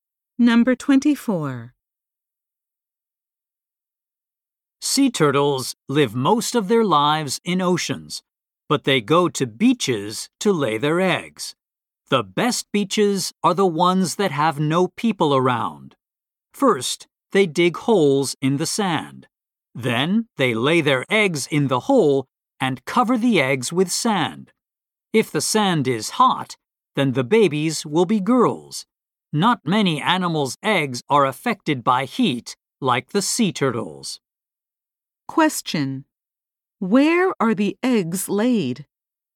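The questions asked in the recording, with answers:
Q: where are the eggs laid?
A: In holes dug in the sand on beaches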